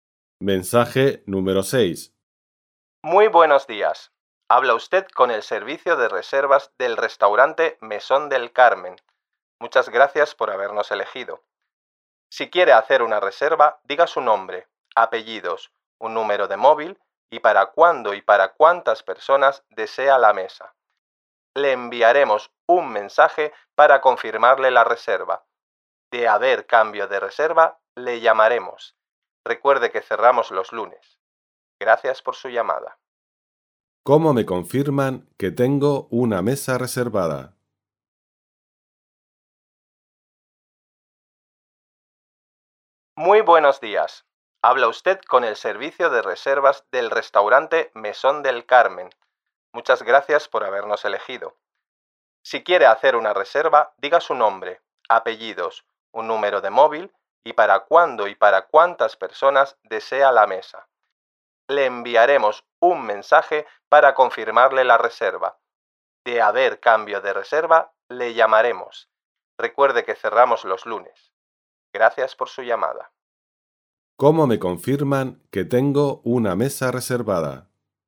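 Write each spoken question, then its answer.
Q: ¿Cómo me confirman que tengo una mesa reservada?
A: Con un mensaje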